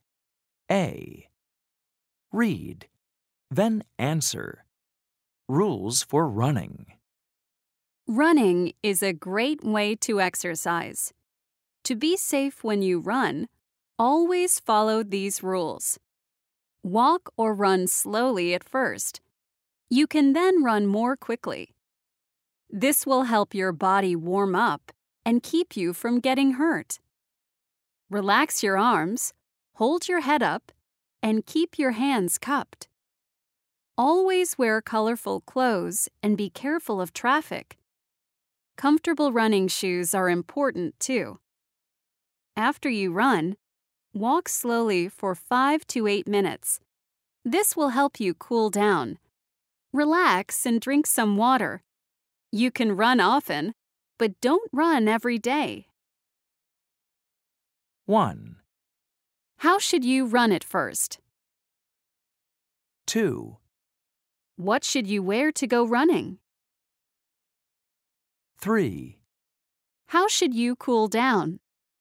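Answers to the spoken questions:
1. Slowly (walk or run slowly)
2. Colorful clothes and comfortable running shoes
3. Walk slowly for 5 to 8 minutes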